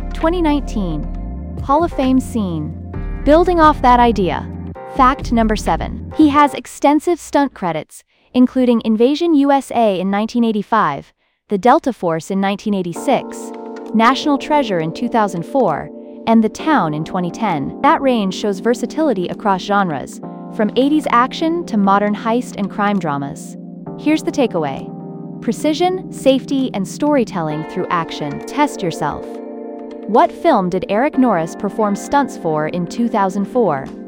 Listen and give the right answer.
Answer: National Treasure.